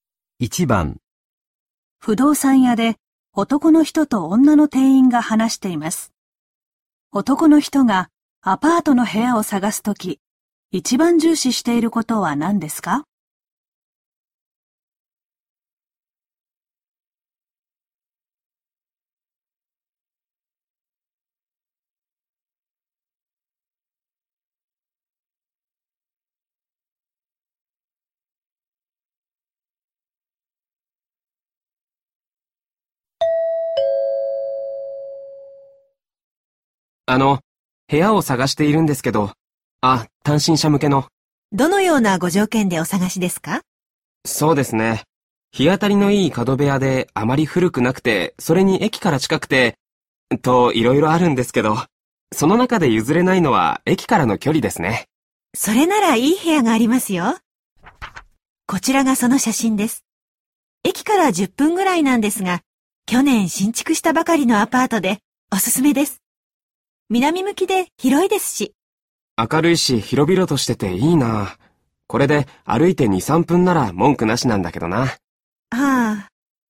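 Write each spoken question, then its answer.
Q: 男の人がアパートの部屋を探すとき、一番重視していることは何ですか?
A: 駅からの距離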